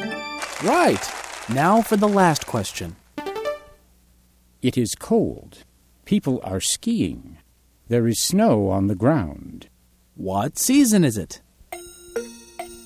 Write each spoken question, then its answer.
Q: What season is it?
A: Winter. It's winter.